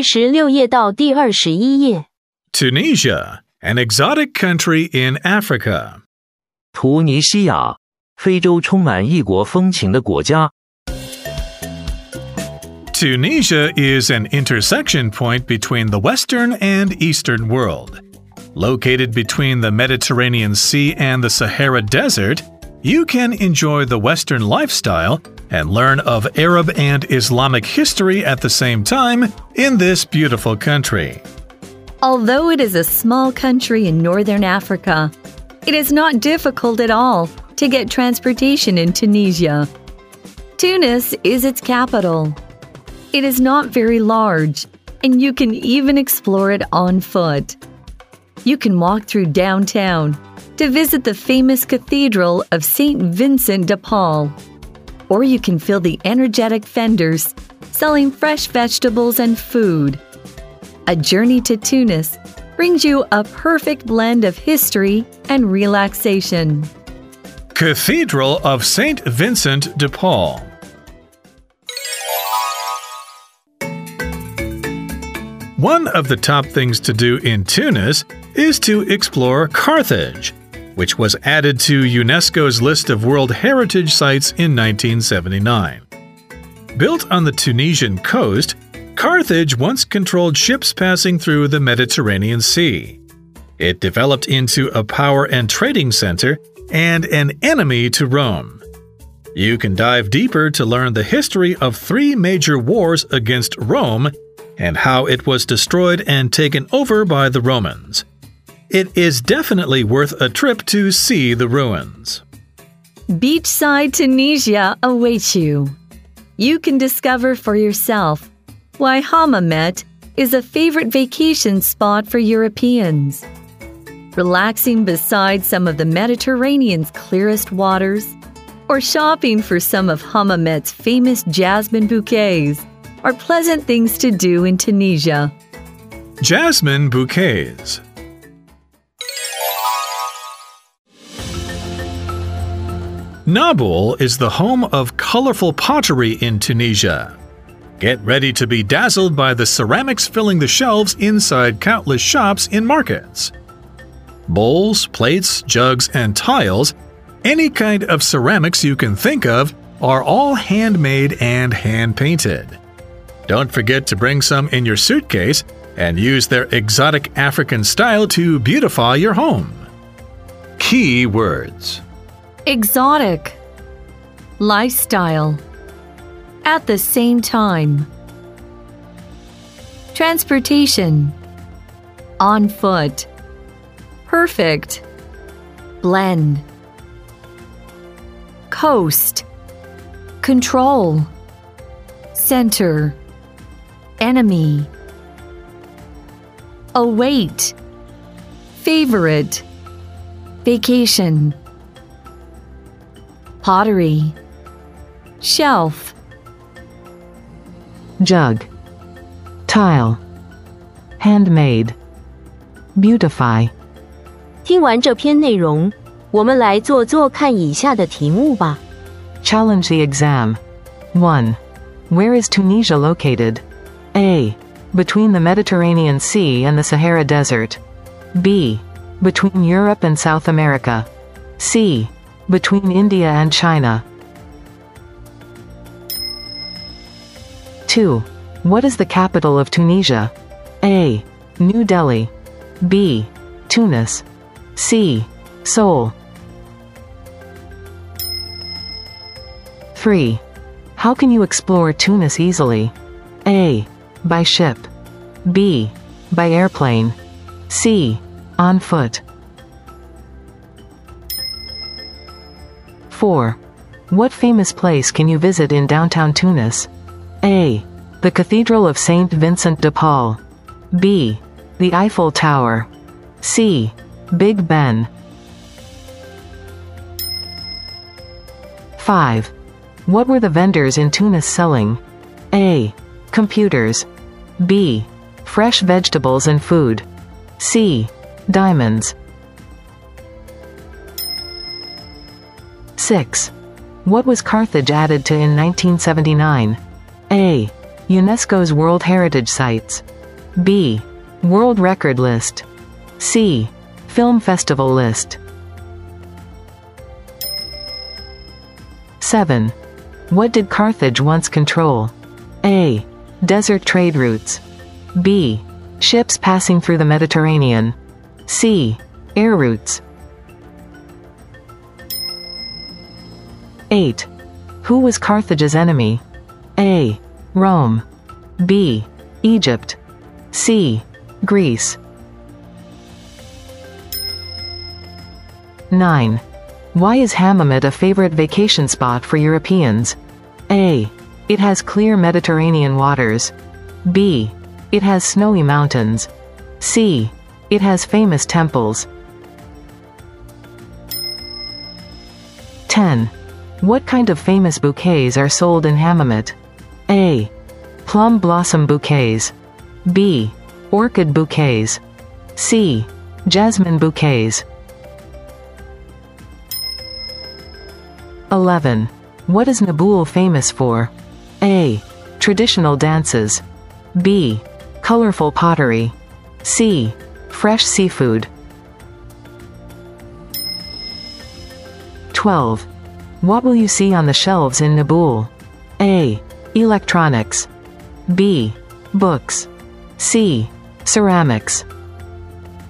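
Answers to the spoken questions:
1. A: Between the Mediterranean Sea and the Sahara Desert.
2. B: Tunis.
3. C: On foot.
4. A: The Cathedral of St. Vincent de Paul.
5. B: Fresh vegetables and food.
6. A: UNESCO's World Heritage Sites.
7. B: Ships passing through the Mediterranean.
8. A: Rome.
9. A: It has clear Mediterranean waters.
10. C: Jasmine bouquets.
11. B: Colorful pottery.
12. C: Ceramics.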